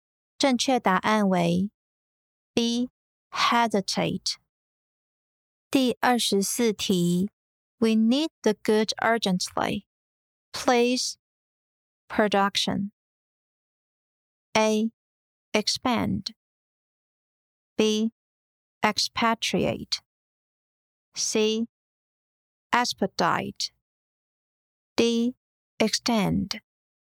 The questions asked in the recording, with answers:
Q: Please, production.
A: 正确答案为 C. Expedite.